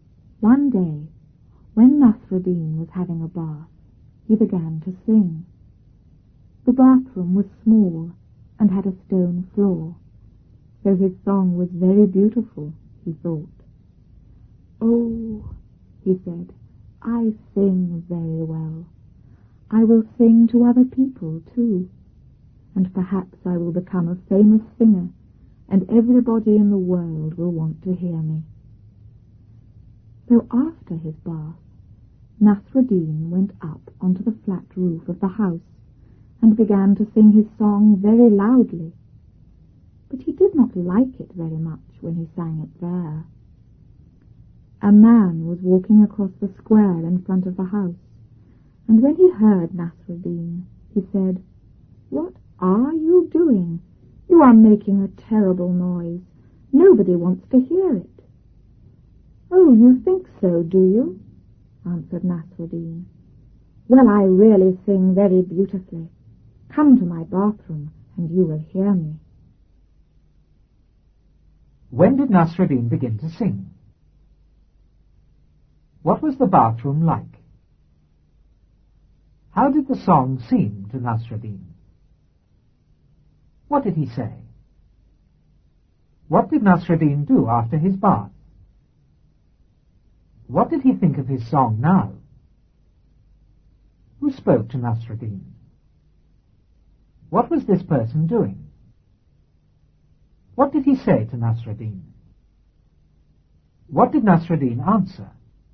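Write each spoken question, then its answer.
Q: When did Nasruddin begin to sing?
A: When he was having a bath

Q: What was the bathroom like?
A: Small, with a stone floor

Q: How did the song seem to Nasruddin?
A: Very beautiful

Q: What did he say?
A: Oh, I sing very well

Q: What did Nasruddin do after his bath?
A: Went up onto the flat roof and sang loudly

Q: What did he think of his song now?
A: He did not like it very much

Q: Who spoke to Nasruddin?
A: A man

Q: What was this person doing?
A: Walking across the square in front of the house

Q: What did he say to Nasruddin?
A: You are making a terrible noise; nobody wants to hear it

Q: What did Nasruddin answer?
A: I really sing very beautifully; come to my bathroom and you will hear me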